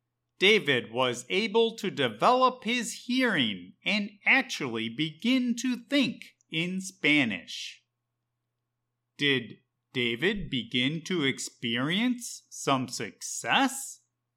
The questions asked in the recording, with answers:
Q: Did David begin to experience some success?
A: Yes, David was able to develop his hearing and actually begin to think in Spanish for the first time.